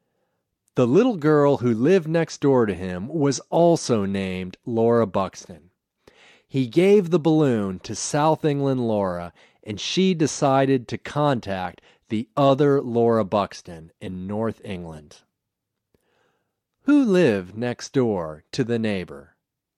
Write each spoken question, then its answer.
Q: Who lived next door to the neighbor?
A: Another girl named Laura Buxton lived next door to the neighbor.